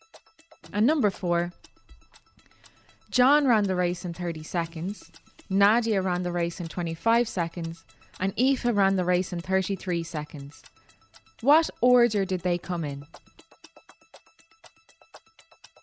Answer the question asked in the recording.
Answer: Nadia was first, John was second, and Aoife was third.